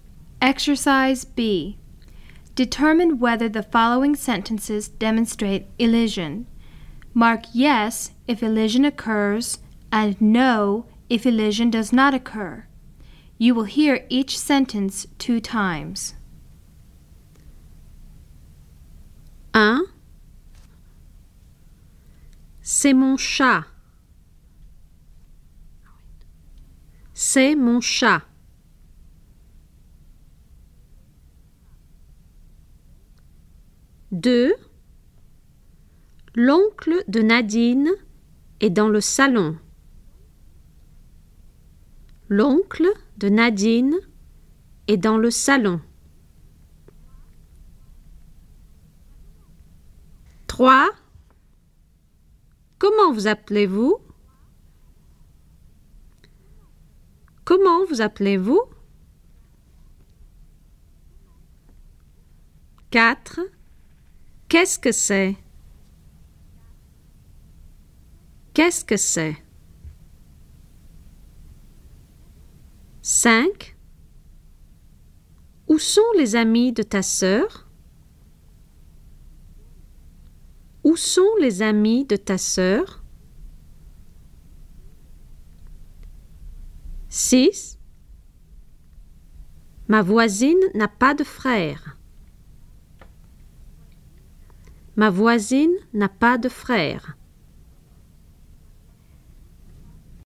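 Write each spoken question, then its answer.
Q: C'est mon chat.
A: yes

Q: L'oncle de Nadine est dans le salon.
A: yes

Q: Comment vous appelez-vous?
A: no

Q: Qu'est-ce que c'est?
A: yes

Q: Où sont les amis de ta sœur?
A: no

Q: Ma voisine n'a pas de frère.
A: yes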